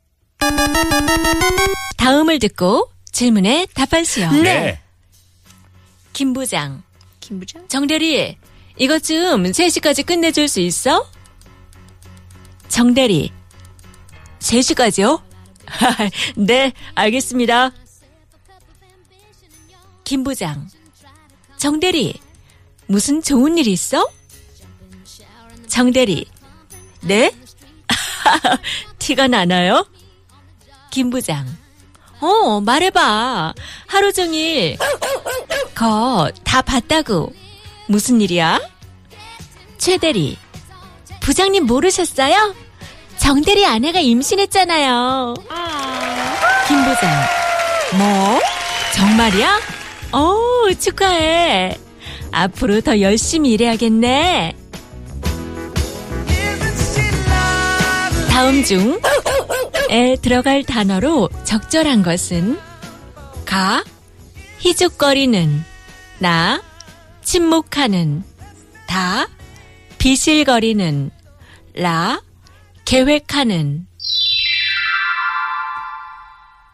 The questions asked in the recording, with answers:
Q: 다음 중에 들어갈 단어로 적절한 것은 가, 희죽거리는, 나, 침묵하는, 다, 비실거리는, 라, 계획하는.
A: 가, 희죽거리는. 하루 종일 희죽거리는가, 거...